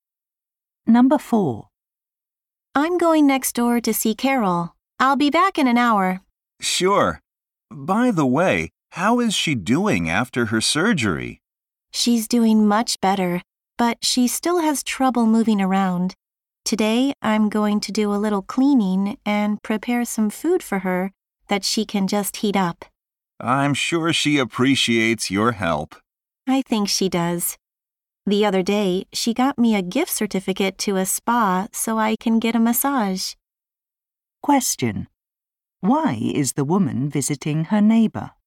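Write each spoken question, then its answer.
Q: Why is the woman visiting her neighbor?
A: To help her by cleaning and preparing food after her surgery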